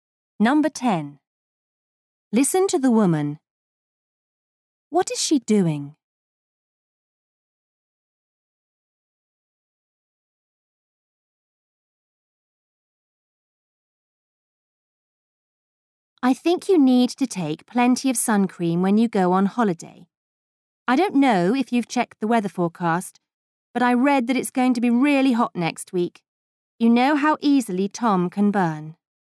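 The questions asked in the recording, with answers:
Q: What is she doing?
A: Giving advice (to take sun cream)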